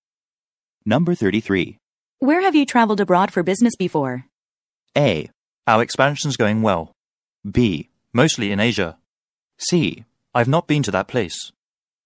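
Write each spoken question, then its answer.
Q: Where have you traveled abroad for business before?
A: B: Mostly in Asia.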